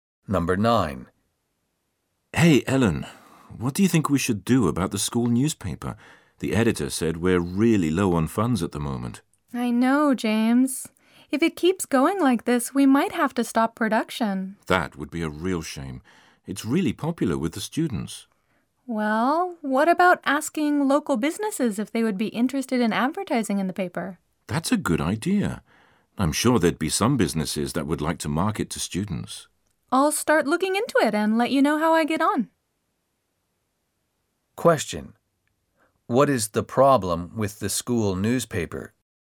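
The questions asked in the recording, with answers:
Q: What is the problem with the school newspaper?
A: It is low on funds (it doesn't have enough money).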